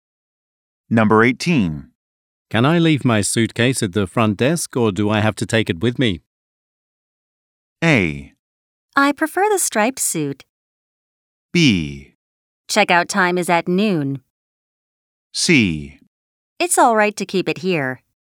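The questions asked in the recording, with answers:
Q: Can I leave my suitcase at the front desk or do I have to take it with me?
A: C: It's all right to keep it here.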